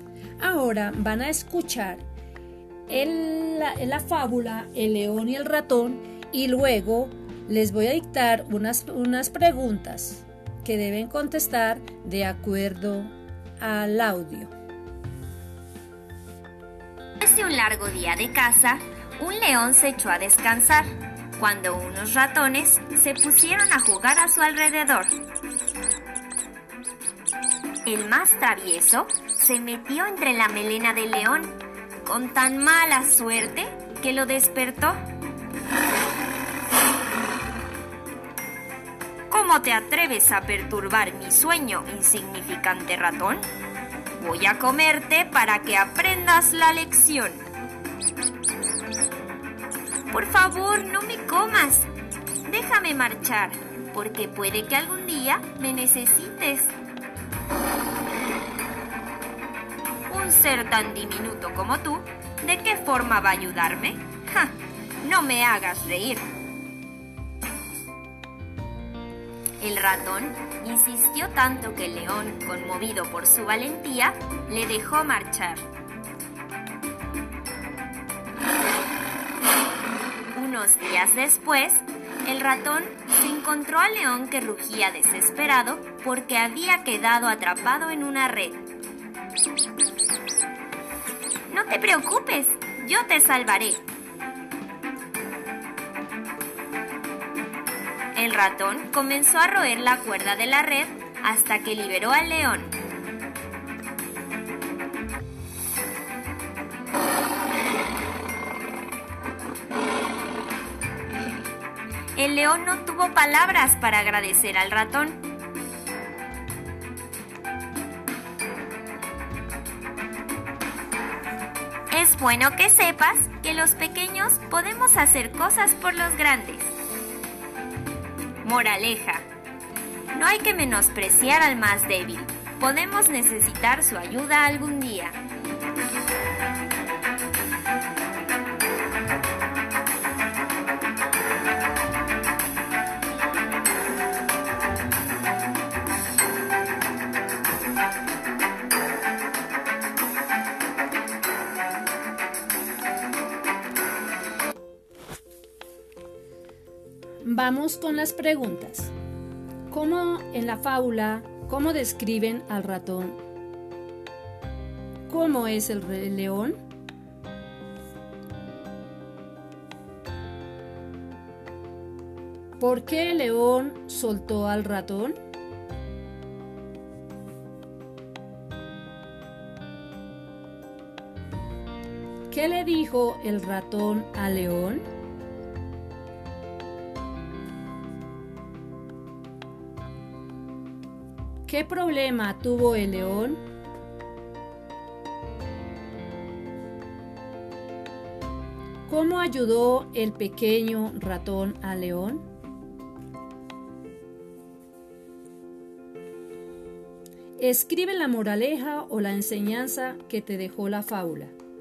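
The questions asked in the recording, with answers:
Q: ¿Por qué el león soltó al ratón?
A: Porque el ratón insistió tanto que el león, conmovido por su valentía, lo dejó marchar

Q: ¿Qué le dijo el ratón al león?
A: Que no lo comiera y lo dejara marchar, porque algún día podría necesitarlo

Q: ¿Qué problema tuvo el león?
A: Quedó atrapado en una red

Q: ¿Cómo ayudó el pequeño ratón al león?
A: Royó la cuerda de la red hasta liberarlo

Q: Escribe la moraleja o la enseñanza que te dejó la fábula.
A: No hay que menospreciar al más débil; podemos necesitar su ayuda algún día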